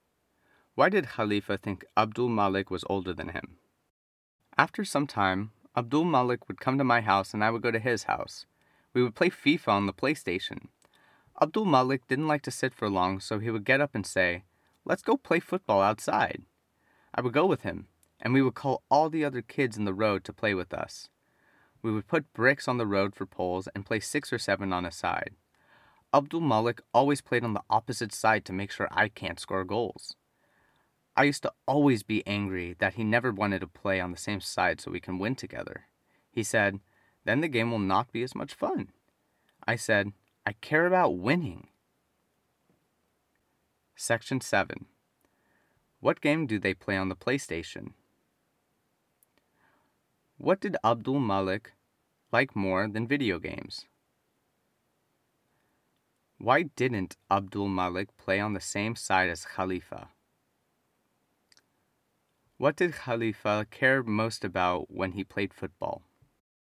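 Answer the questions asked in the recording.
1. FIFA
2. Playing football outside
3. Because the game would not be as much fun
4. Winning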